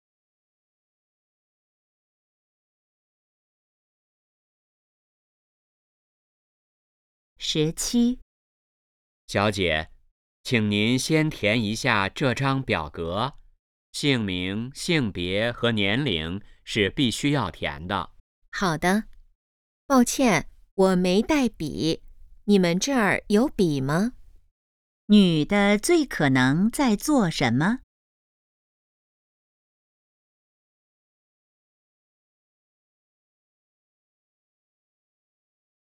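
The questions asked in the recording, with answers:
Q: 女的最可能在做什么?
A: 填表格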